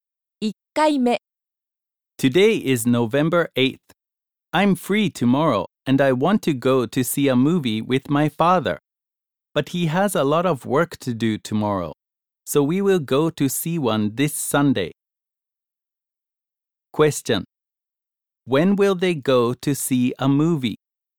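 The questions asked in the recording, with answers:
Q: When will they go to see a movie?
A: This Sunday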